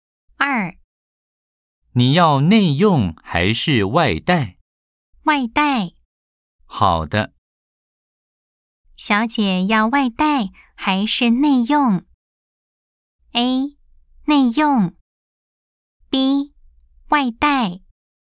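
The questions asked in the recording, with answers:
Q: 小姐要外带还是内用?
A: B: 外带。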